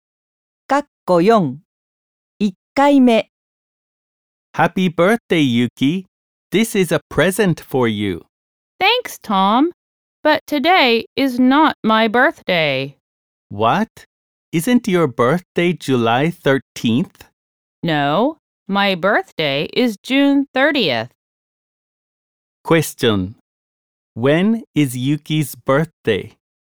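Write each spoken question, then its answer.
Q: When is Yuki's birthday?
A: June 30th.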